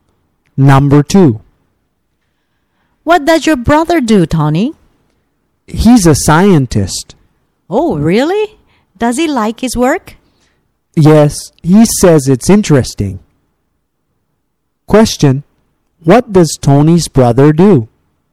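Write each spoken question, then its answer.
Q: what does Tony's brother do?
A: He's a scientist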